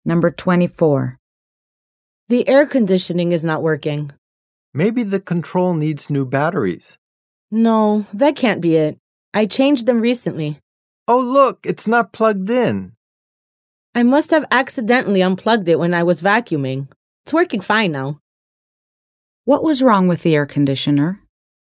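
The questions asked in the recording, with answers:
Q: What was wrong with the air conditioner?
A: It was not plugged in.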